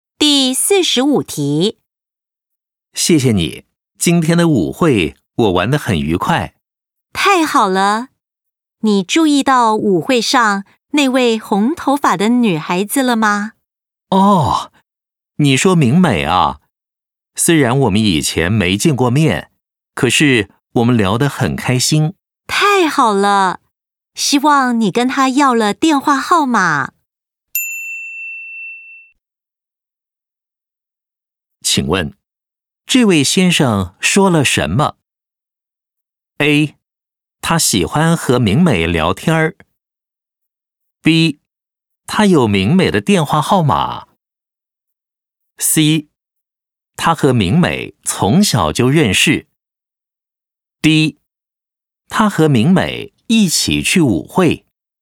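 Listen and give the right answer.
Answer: A: 他喜欢和明美聊天。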